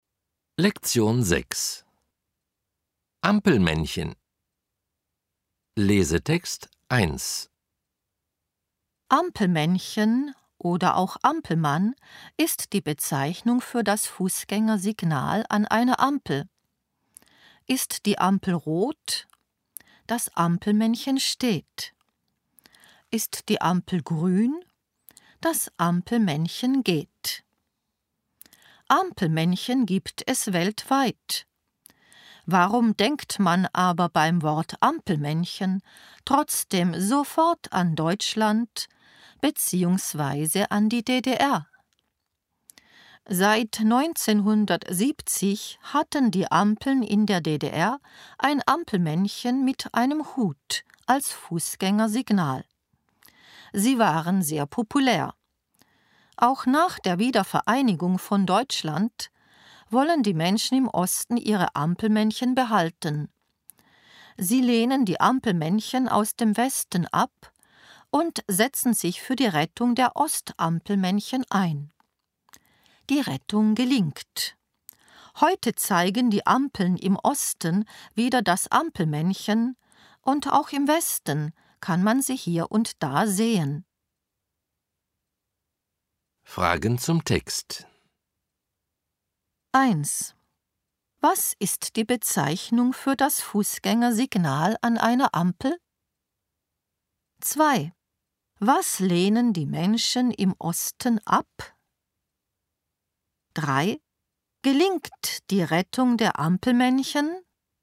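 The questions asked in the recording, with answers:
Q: Was ist die Bezeichnung für das Fußgängersignal an einer Ampel?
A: Ampelmännchen (oder Ampelmann)

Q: Was lehnen die Menschen im Osten ab?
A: Die Ampelmännchen aus dem Westen

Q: Gelingt die Rettung der Ampelmännchen?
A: Ja, die Rettung gelingt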